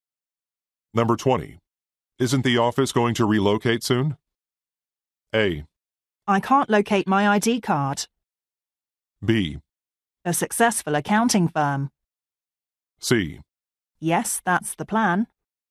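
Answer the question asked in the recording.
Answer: C: Yes, that's the plan.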